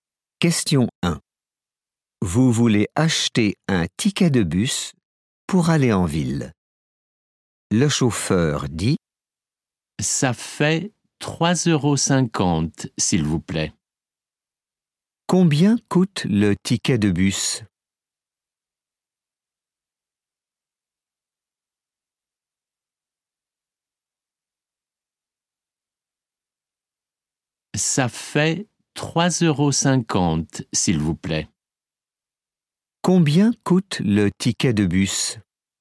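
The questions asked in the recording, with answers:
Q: Combien coûte le ticket de bus ?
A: 3,50 €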